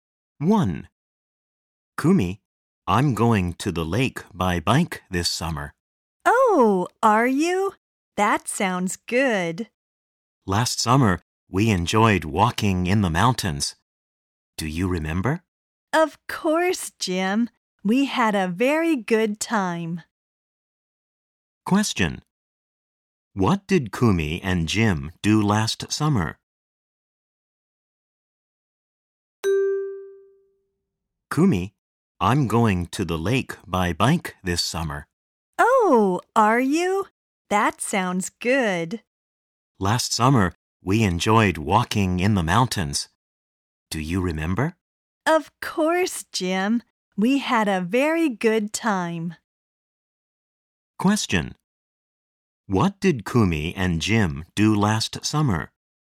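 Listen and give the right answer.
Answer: They enjoyed walking in the mountains.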